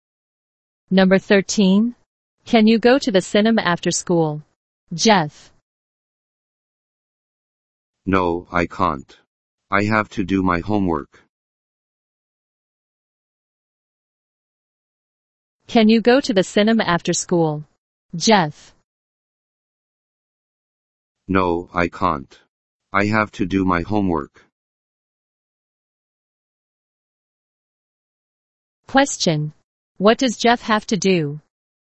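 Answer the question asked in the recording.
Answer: Do his homework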